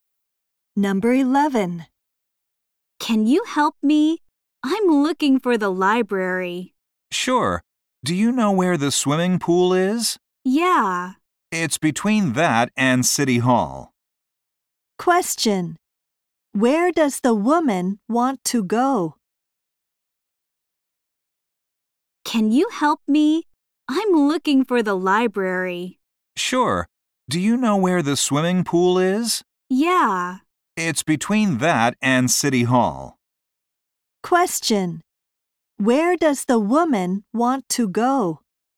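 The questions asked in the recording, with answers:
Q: Where does the woman want to go?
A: The library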